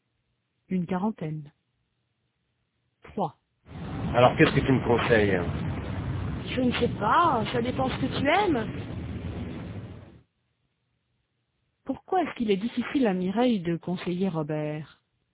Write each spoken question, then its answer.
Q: Pourquoi est-ce qu'il est difficile à Mireille de conseiller Robert?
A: Parce que ça dépend de ce qu'il aime.